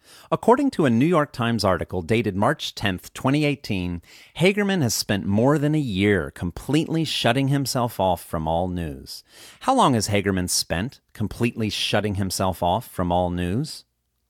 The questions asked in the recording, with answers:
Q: How long has Hagerman spent completely shutting himself off from all news?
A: Hagerman has spent more than a year completely shutting himself off from all news.